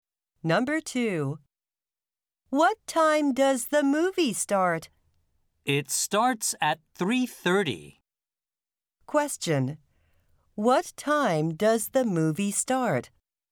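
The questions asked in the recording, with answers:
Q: What time does the movie start?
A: At 3:30.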